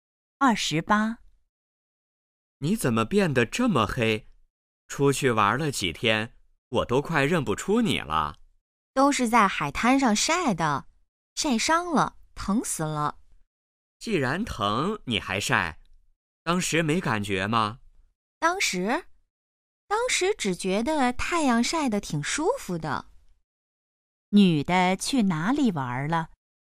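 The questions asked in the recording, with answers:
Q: 女的去哪里玩了?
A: 海滩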